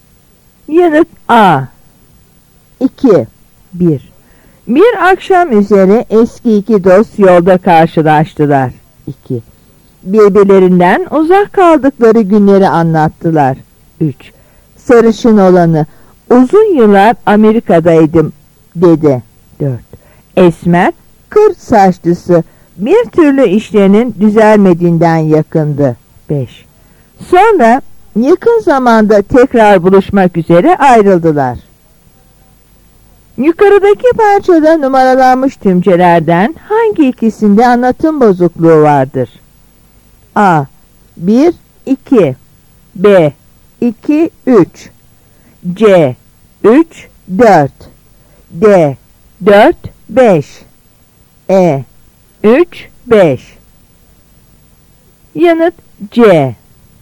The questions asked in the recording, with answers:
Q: Yukarıdaki parçada numaralanmış tümcelerden hangi ikisinde anlatım bozukluğu vardır?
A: Yanıt C.